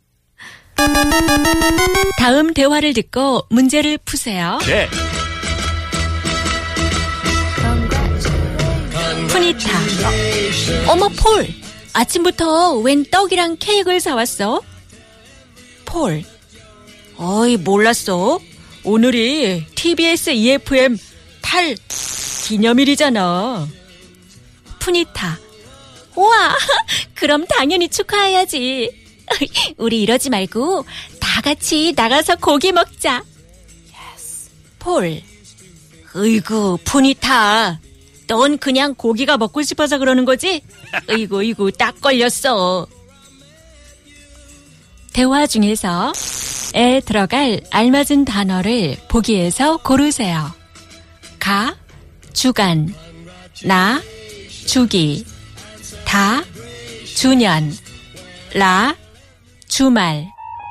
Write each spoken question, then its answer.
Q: 대화 중에서 에 들어갈 알맞은 단어를 보기에서 고르세요.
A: Da junyon.